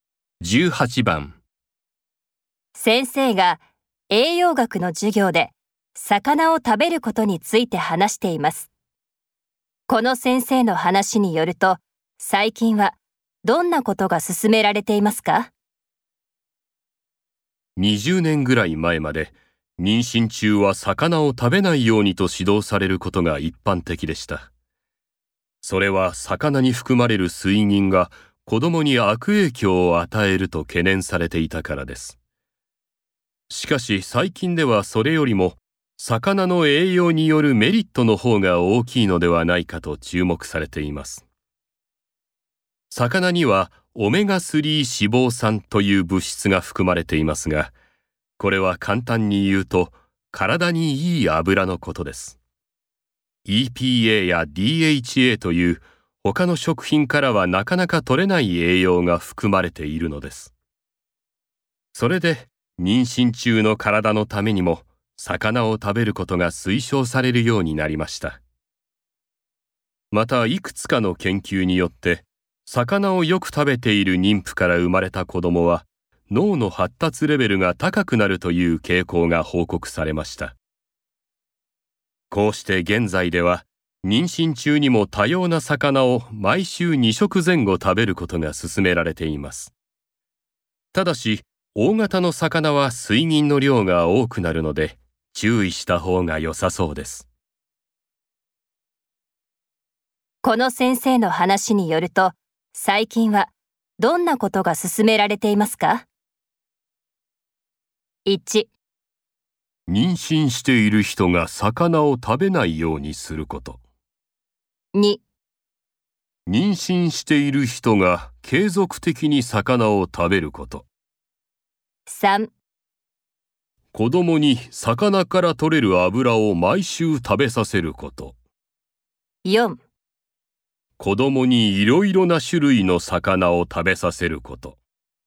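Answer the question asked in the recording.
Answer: 2: 妊娠している人が継続的に魚を食べること。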